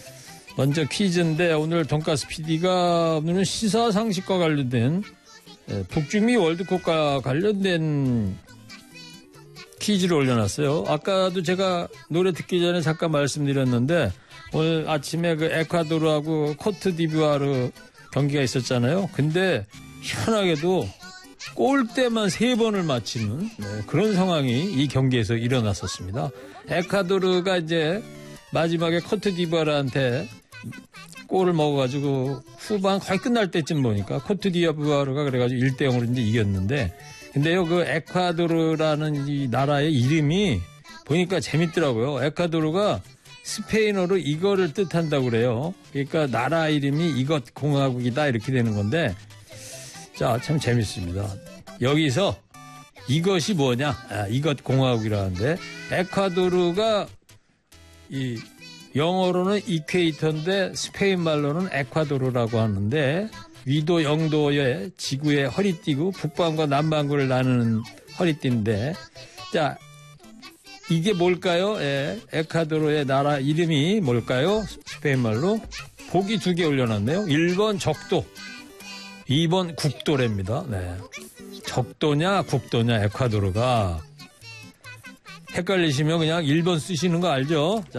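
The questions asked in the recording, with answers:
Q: 예, 에콰도르의 나라 이름이 뭘까요?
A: 1번: 적도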